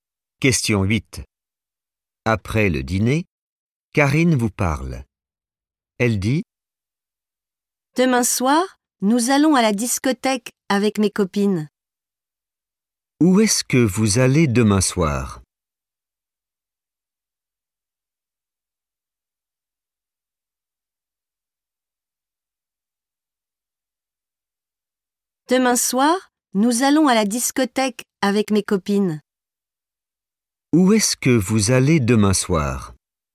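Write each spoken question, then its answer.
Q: Où est-ce que vous allez demain soir?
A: à la discothèque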